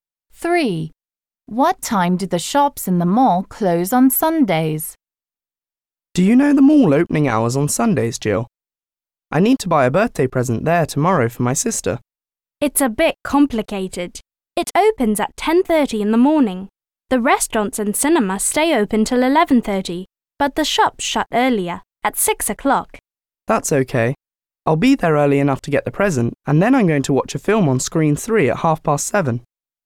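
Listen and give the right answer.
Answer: At 6 o'clock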